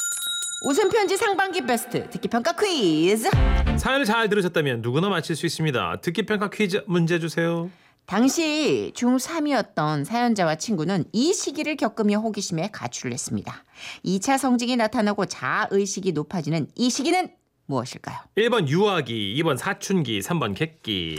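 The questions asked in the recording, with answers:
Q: 2차 성징이 나타나고 자아의식이 높아지는 이 시기는 무엇일까요?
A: 2번: 사춘기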